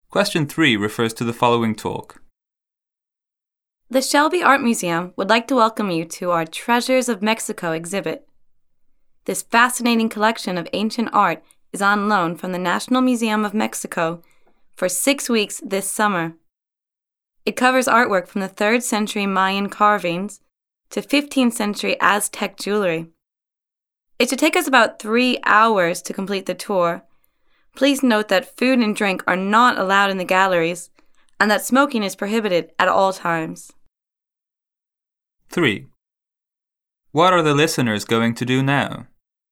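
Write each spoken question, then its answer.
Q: What are the listeners going to do now?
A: Take a tour of the Treasures of Mexico art exhibit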